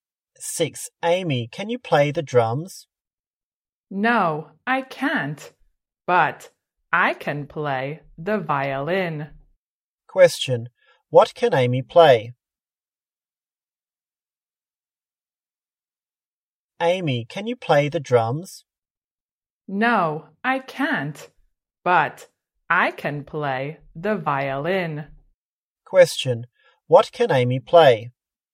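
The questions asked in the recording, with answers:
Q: what can Amy play?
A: the violin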